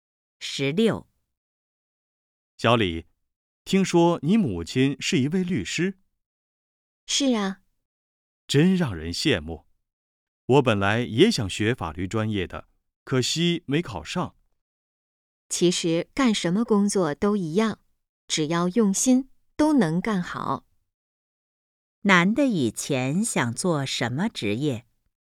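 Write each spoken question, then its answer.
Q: 男的以前想做什么职业?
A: 律师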